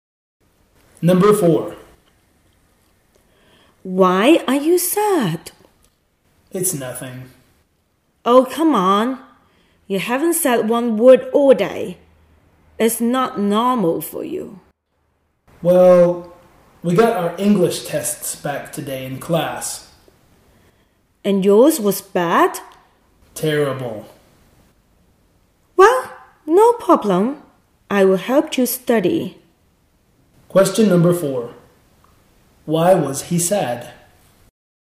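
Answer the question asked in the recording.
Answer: His English test result was terrible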